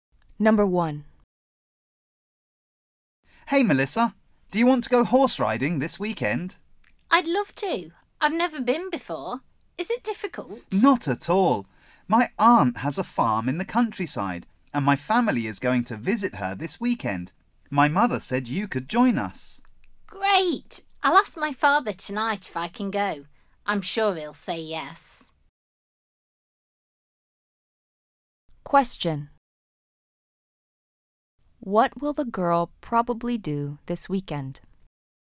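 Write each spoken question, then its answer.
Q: What will the girl probably do this weekend?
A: Go horse riding at the boy's aunt's farm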